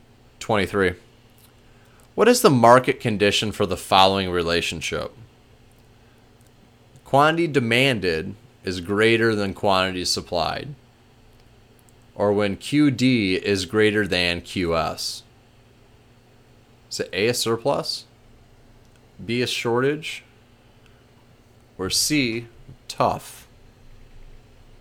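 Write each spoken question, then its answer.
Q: What is the market condition for the following relationship?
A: B: a shortage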